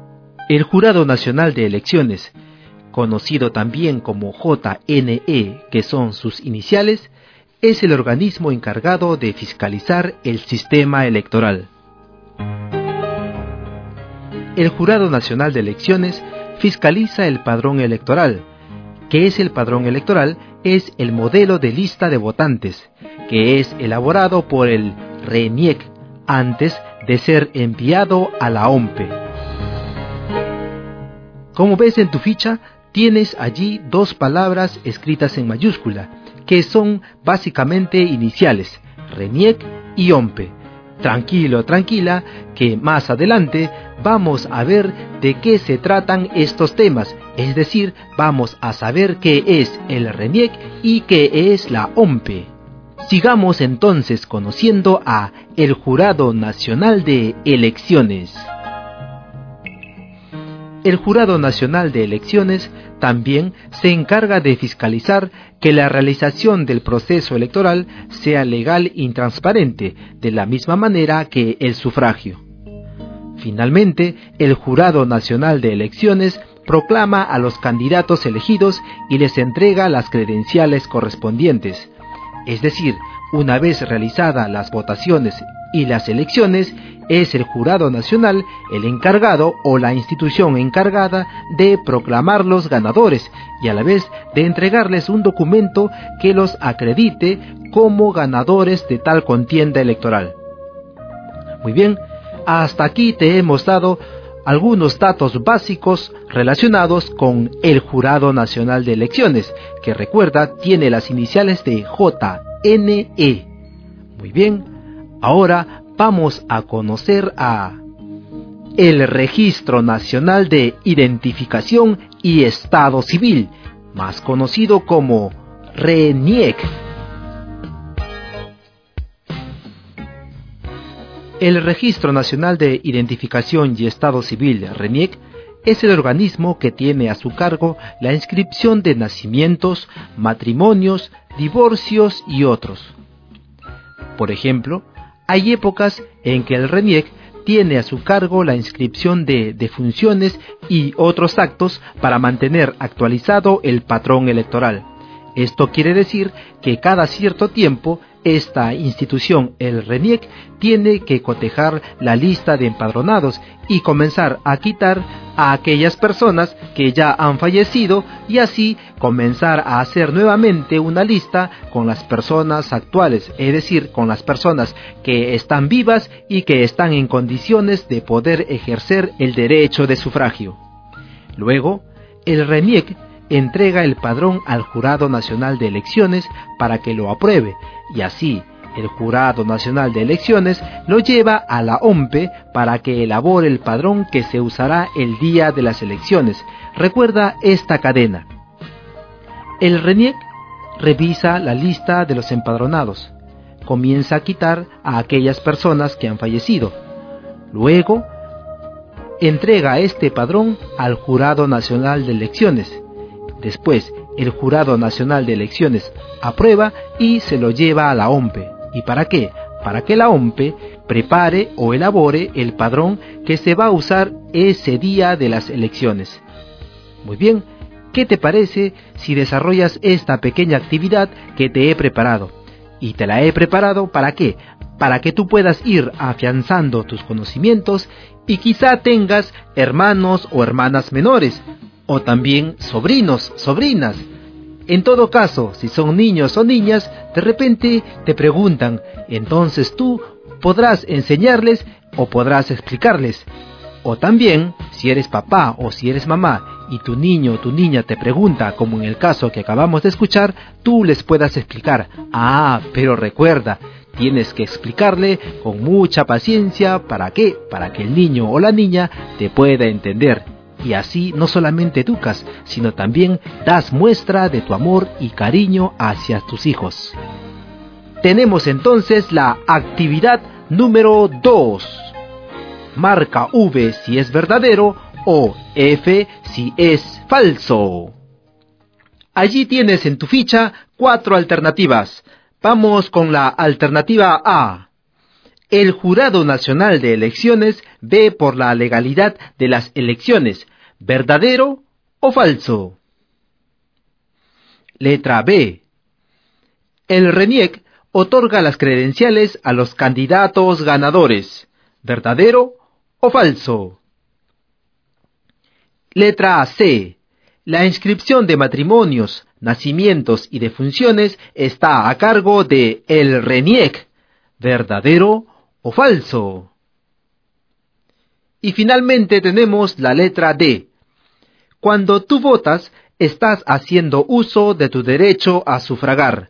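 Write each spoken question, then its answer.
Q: El Jurado Nacional de Elecciones ve por la legalidad de las elecciones. ¿Verdadero o falso?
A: Verdadero

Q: El RENIEC otorga las credenciales a los candidatos ganadores. ¿Verdadero o falso?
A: Falso

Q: La inscripción de matrimonios, nacimientos y defunciones está a cargo de el RENIEC. ¿Verdadero o falso?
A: Verdadero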